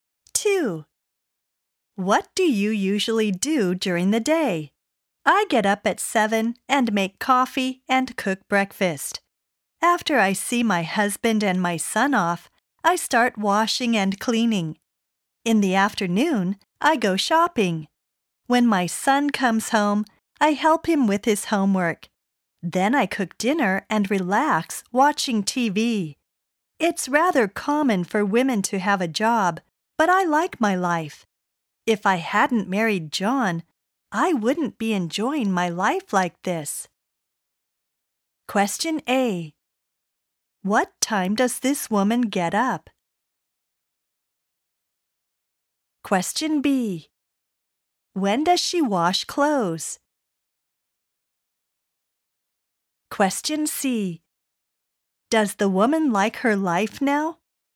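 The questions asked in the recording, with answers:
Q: What time does this woman get up?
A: At 7

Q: When does she wash clothes?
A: After she sees her husband and son off

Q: Does the woman like her life now?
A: Yes, she does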